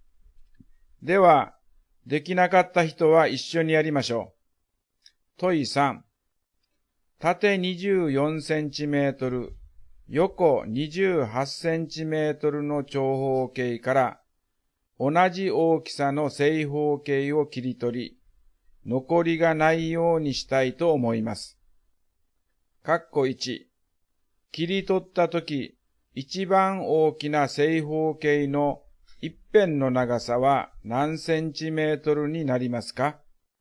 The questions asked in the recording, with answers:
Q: 切り取ったとき、一番大きな正方形の一辺の長さは何センチメートルになりますか?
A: 24と28の最大公約数は4です